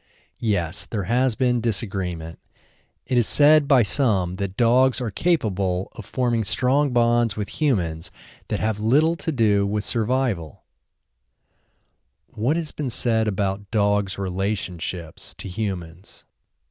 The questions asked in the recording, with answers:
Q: What has been said about dogs' relationships to humans?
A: It is said by some that dogs are capable of forming strong bonds with humans that have little to do with survival.